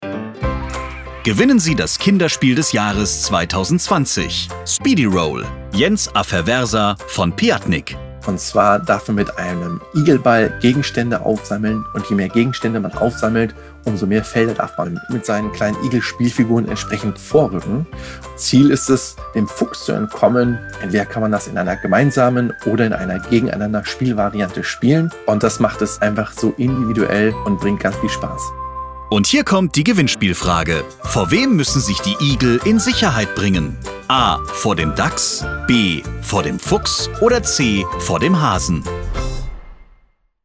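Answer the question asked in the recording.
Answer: B: Vor dem Fuchs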